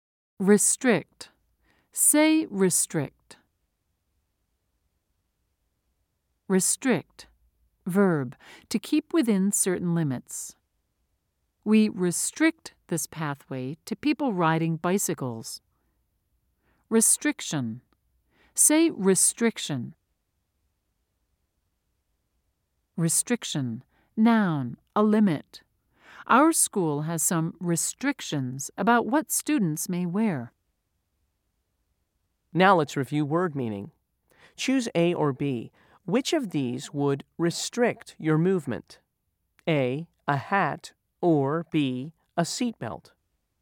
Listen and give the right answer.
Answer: If you said B, you're correct.